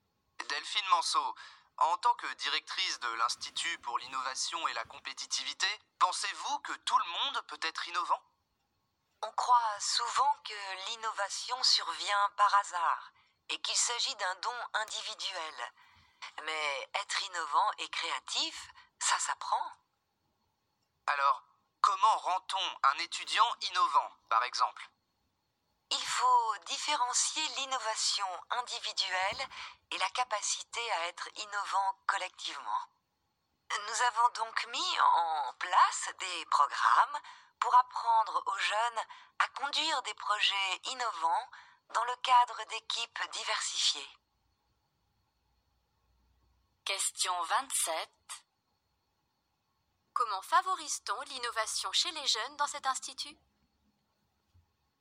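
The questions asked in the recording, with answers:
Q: Comment favorise-t-on l'innovation chez les jeunes dans cet institut ?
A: Avec des programmes qui leur apprennent à conduire des projets innovants au sein d'équipes diversifiées.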